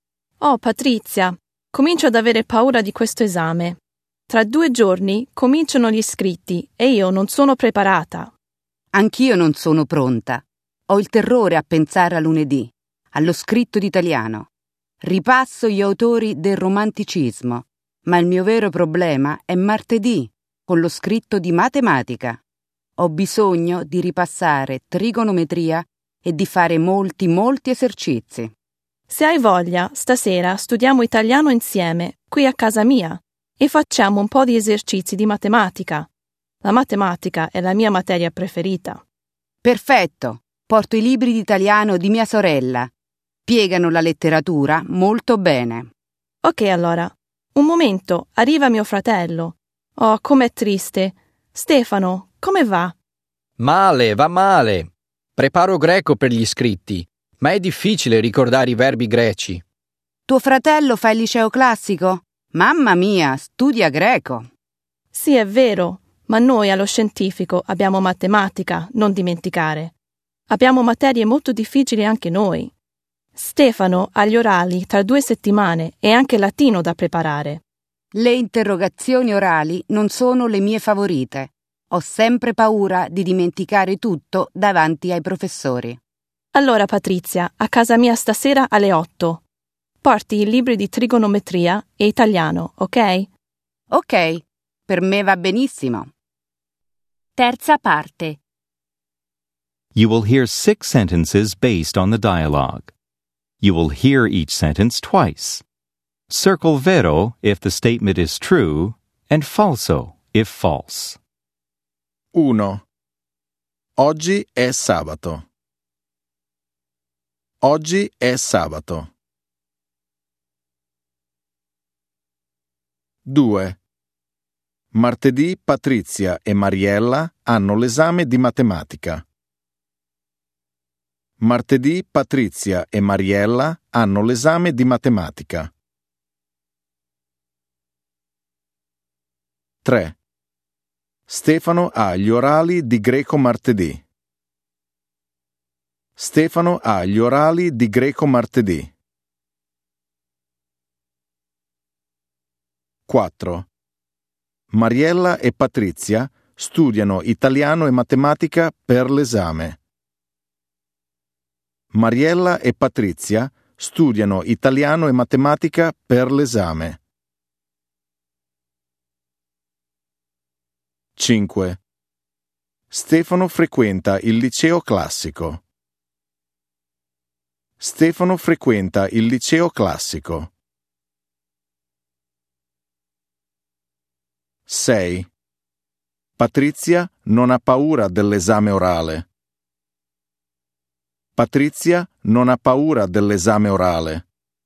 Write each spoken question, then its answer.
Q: Oggi è sabato.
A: 1. Vero.

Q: Martedì Patrizia e Mariella hanno l'esame di matematica.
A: 2. Vero.

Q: Stefano ha gli orali di greco martedì.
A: 3. Falso.

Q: Mariella e Patrizia studiano italiano e matematica per l'esame.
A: 4. Vero.

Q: Stefano frequenta il liceo classico.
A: 5. Vero.

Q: Patrizia non ha paura dell'esame orale.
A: 6. Falso.